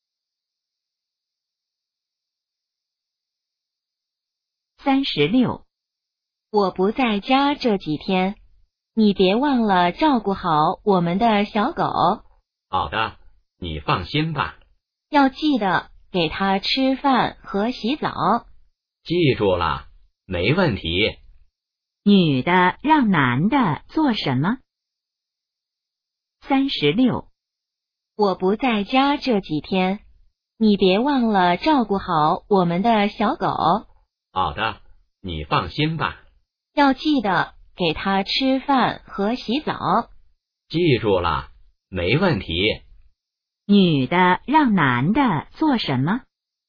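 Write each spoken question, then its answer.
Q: 女的让男的做什么?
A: 照顾小狗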